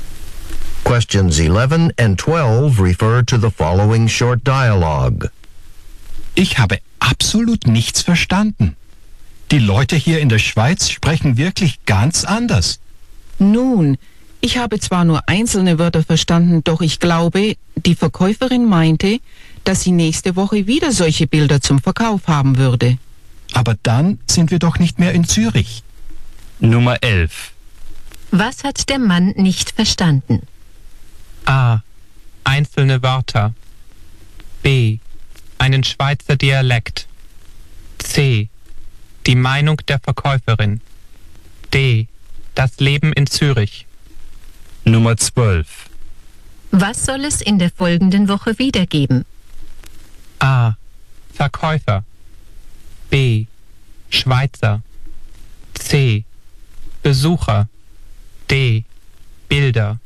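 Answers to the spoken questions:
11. B: Einen Schweizer Dialekt.
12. D: Bilder.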